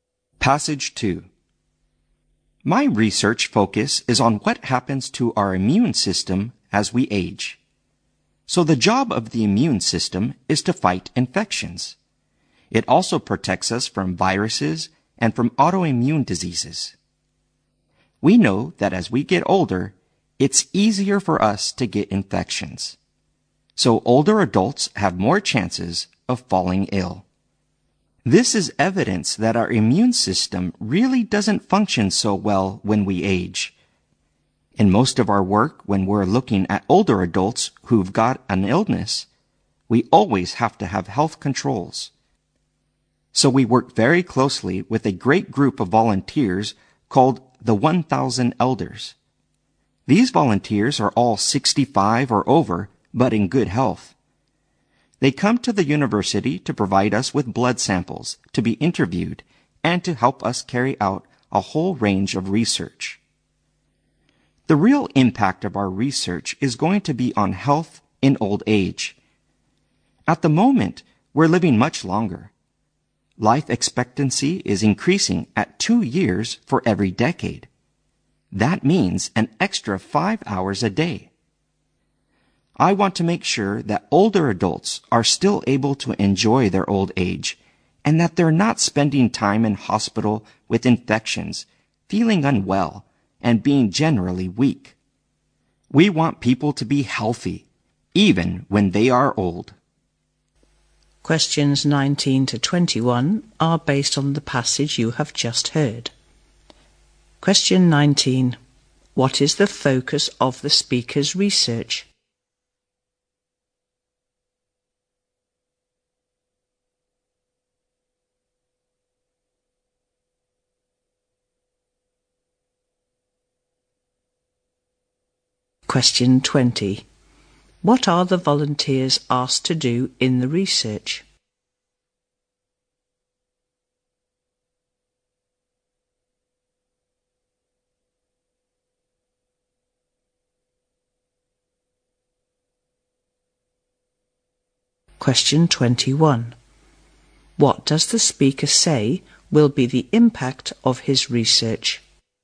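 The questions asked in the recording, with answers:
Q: What is the focus of the speaker's research?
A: What happens to our immune system as we age.

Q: What are the volunteers asked to do in the research?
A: Give blood samples, be interviewed, and help with research.

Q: What does the speaker say will be the impact of his research?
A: It will improve people's health in old age.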